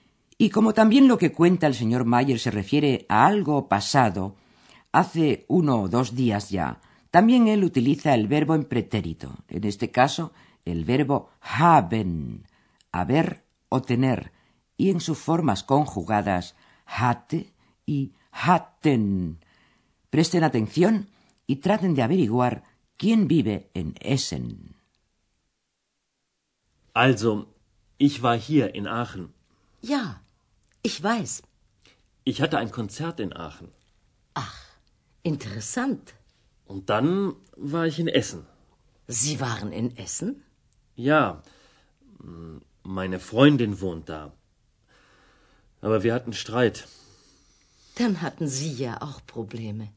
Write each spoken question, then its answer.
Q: traten de averiguar quién vive en Essen.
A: En Essen vive la novia del señor Mayer.